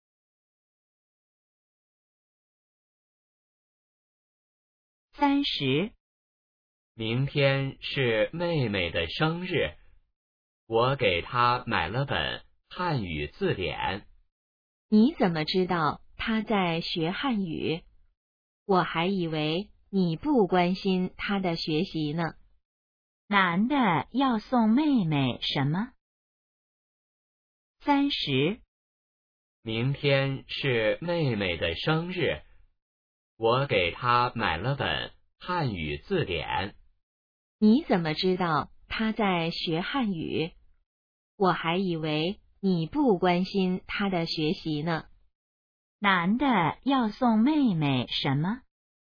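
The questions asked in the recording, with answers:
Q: 男的要送妹妹什么?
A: 汉语字典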